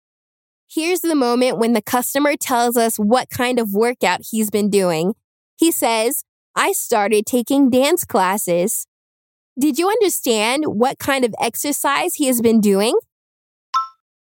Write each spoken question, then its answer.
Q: Did you understand what kind of exercise he has been doing?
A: Yes, he's been dancing.